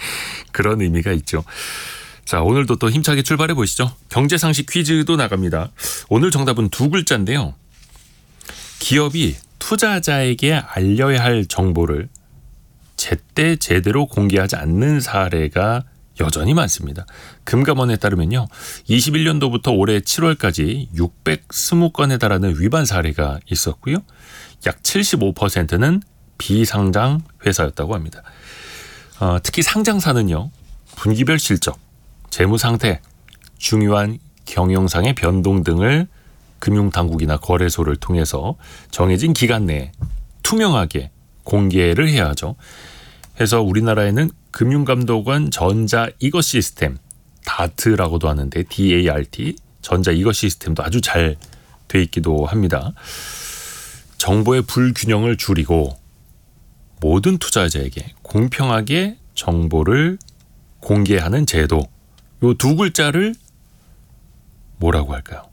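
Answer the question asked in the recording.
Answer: 공시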